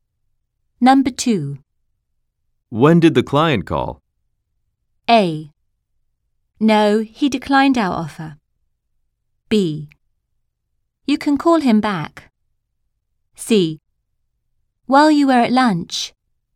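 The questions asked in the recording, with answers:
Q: When did the client call?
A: C: While you were at lunch.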